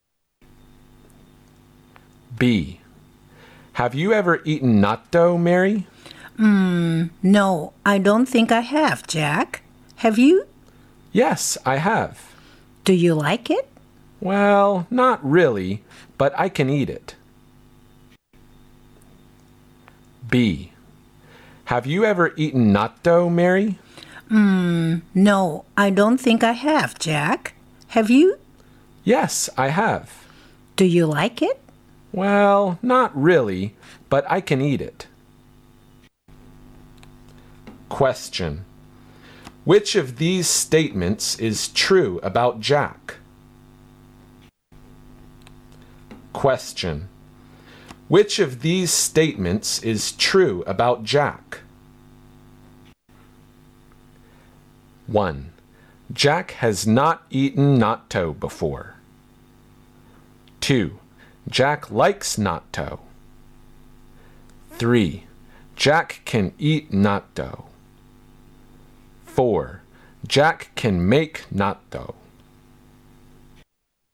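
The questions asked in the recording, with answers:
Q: Question. Which of these statements is true about Jack?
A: 3: Jack can eat natto.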